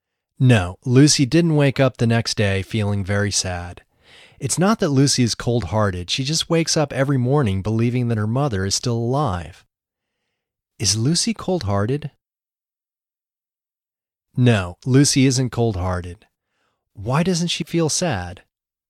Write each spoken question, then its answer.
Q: Why doesn't she feel sad?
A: She doesn't feel sad because she still believes her mother is alive.